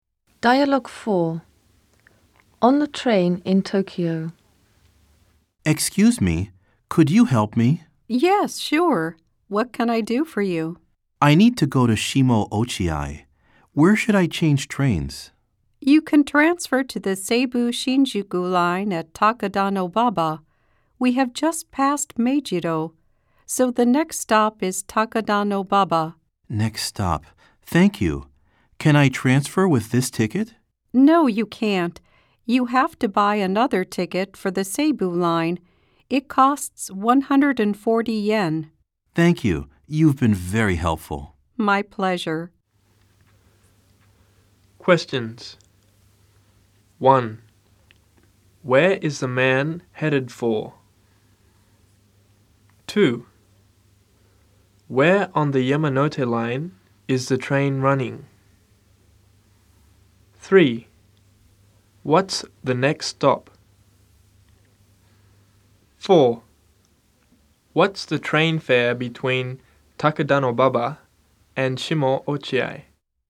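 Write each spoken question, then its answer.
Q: Where is the man headed for?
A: Shimo Ochiai

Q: Where on the Yamanote line is the train running?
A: Between Meijido and Takadanobaba

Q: What's the next stop?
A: Takadanobaba

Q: What's the train fare between Takadanobaba and Shimo Ochiai?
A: 140 yen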